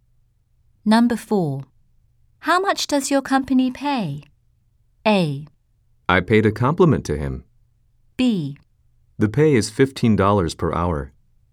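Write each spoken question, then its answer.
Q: How much does your company pay?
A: B: The pay is $15 per hour.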